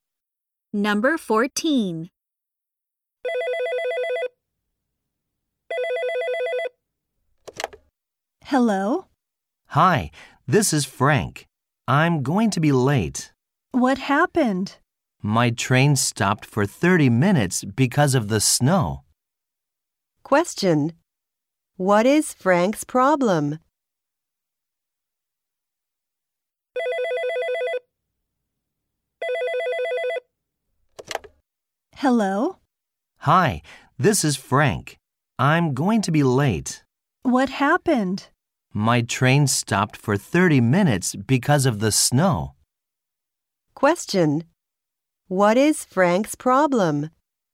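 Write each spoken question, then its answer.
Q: What is Frank's problem?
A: He is going to be late because his train stopped for 30 minutes due to snow.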